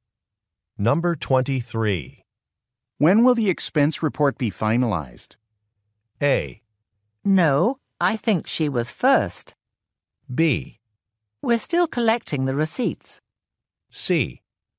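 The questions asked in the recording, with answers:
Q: When will the expense report be finalized?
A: B: We're still collecting the receipts.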